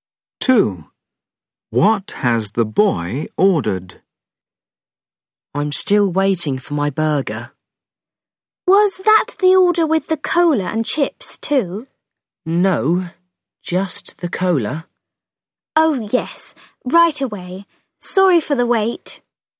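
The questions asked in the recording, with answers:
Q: What has the boy ordered?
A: a burger and a cola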